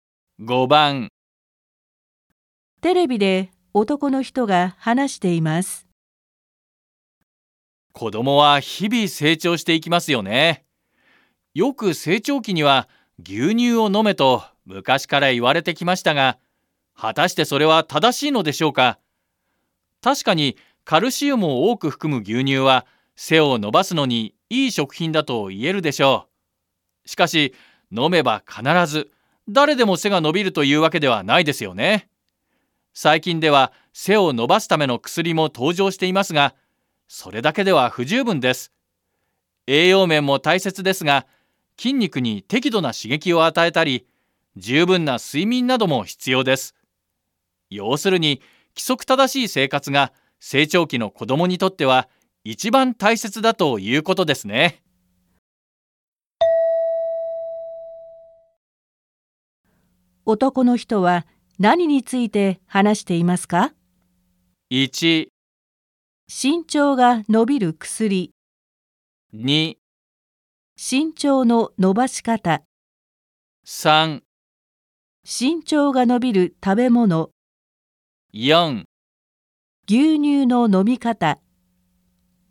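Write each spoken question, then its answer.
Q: 男の人は何について話していますか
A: 2: 身長の伸ばし方。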